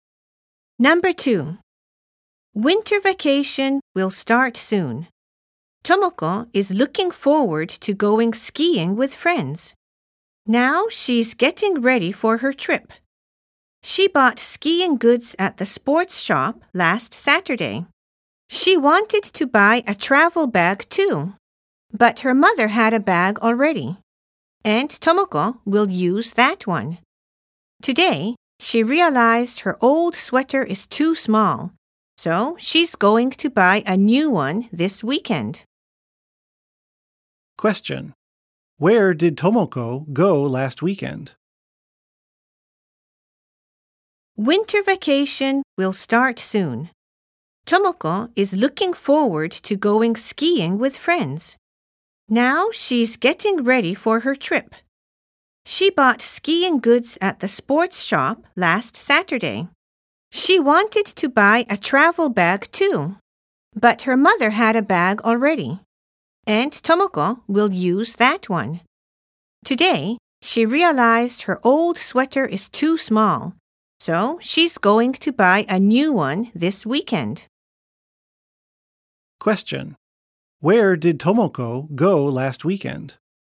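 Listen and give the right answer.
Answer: The sports shop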